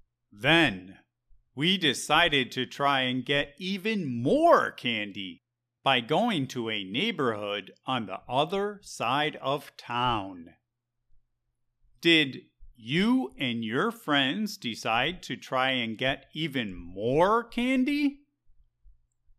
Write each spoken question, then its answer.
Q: Did you and your friends decide to try and get even more candy?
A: Yep, we decided to try to get even more candy by going to the other side of town.